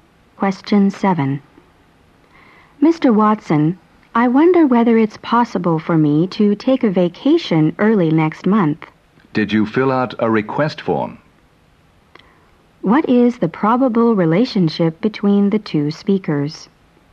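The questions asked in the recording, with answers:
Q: What is the probable relationship between the two speakers?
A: Employee and boss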